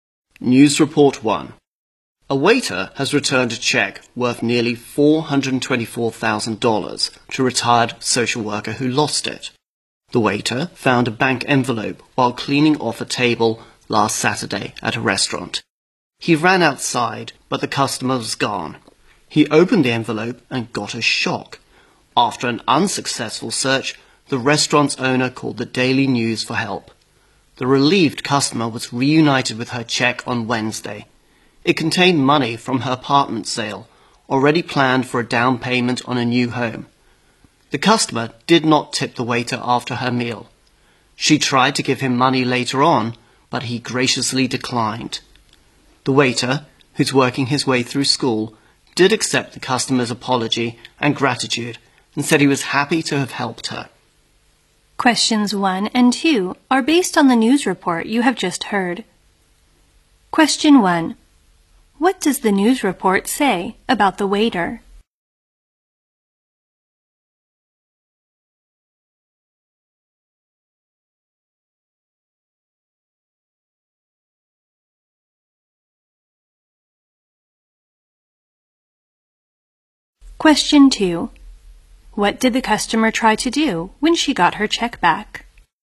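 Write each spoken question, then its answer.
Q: What does the news report say about the waiter?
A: He returned a lost check worth nearly $424,000 to its owner

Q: What did the customer try to do when she got her check back?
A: Give the waiter some money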